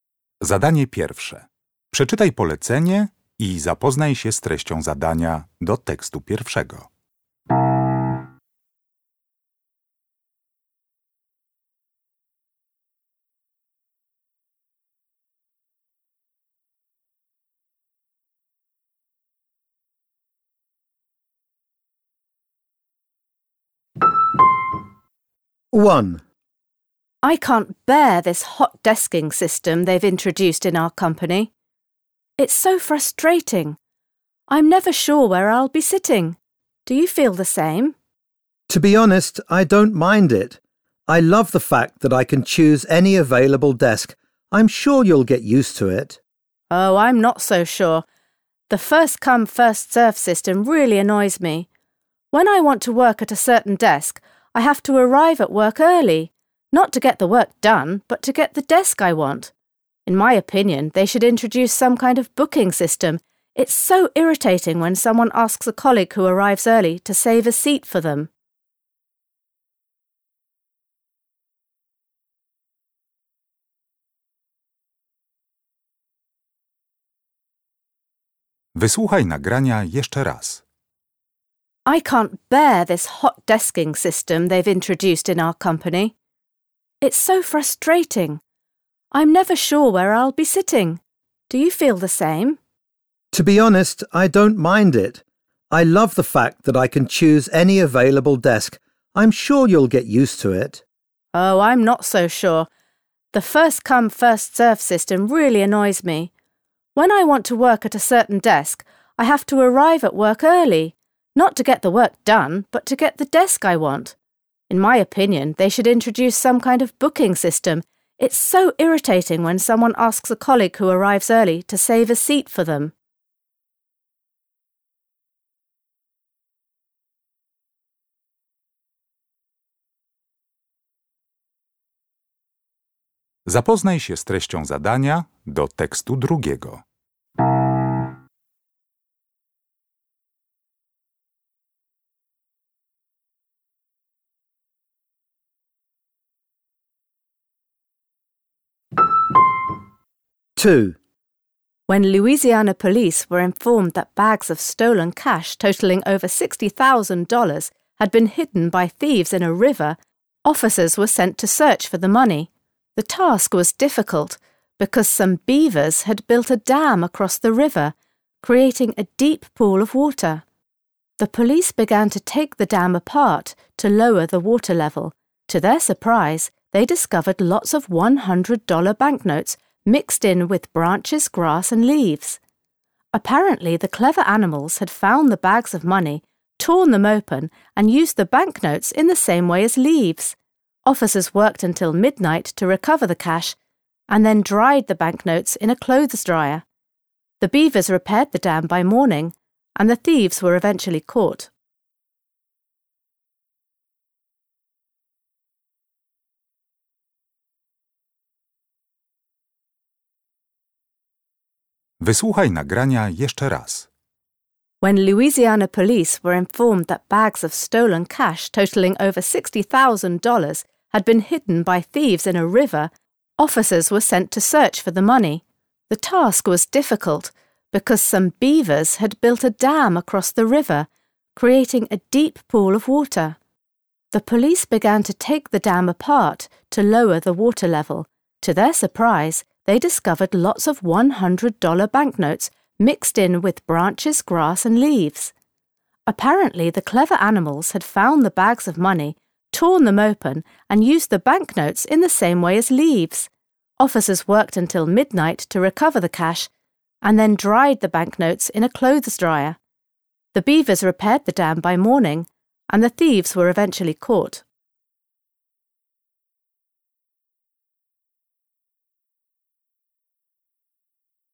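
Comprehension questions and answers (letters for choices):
Uruchamiając odtwarzacz z oryginalnym nagraniem CKE usłyszysz dwukrotnie trzy teksty. Z podanych odpowiedzi wybierz właściwą, zgodną z treścią nagrania.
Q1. From what the woman says, we can conclude that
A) she doesn't consider all the desk locations in her office equally attractive.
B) she doesn't understand how the "first come, first served" system works.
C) she doesn't mind the present system of reserving desks.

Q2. Which is the best headline for the news story?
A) THIEVES USE ANIMALS TO COMMIT A CRIME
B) LOUISIANA POLICE HELP SAVE A DAM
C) AN UNUSUAL BUILDING MATERIAL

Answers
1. A
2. C

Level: Poziom: rozszerzony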